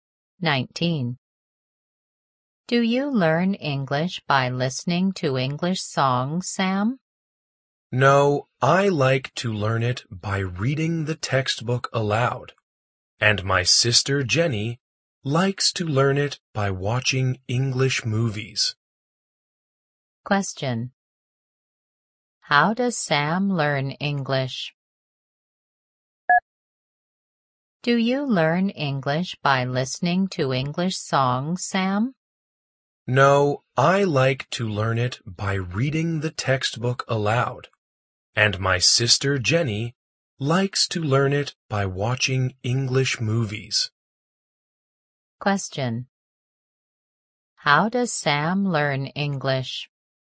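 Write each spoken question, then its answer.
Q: How does Sam learn English?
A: By reading the textbook aloud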